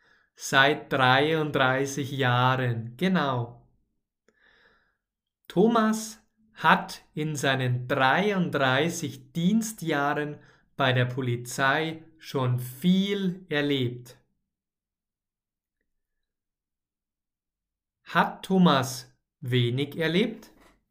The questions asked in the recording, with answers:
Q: Hat Thomas wenig erlebt?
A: Nein, nicht wenig, sondern viel.